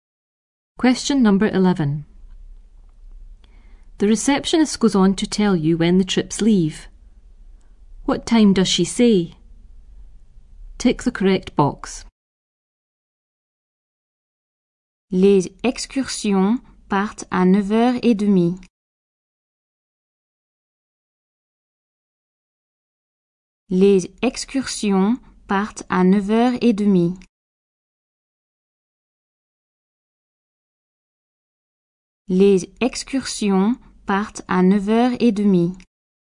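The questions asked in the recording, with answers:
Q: What time does she say?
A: 9:30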